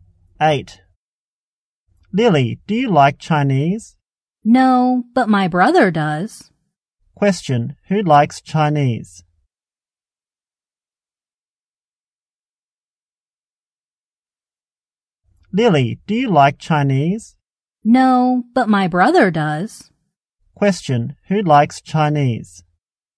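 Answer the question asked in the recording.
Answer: Lily's brother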